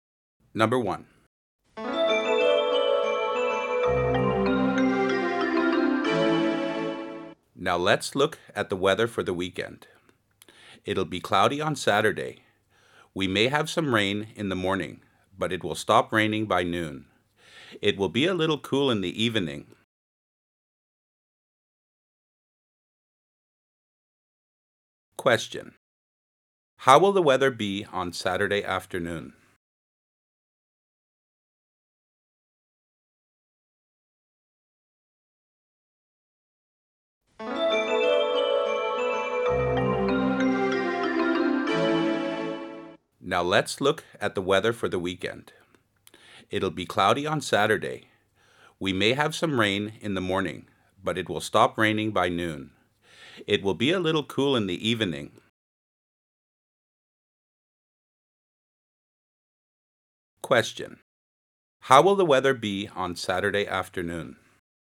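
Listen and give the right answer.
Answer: Cloudy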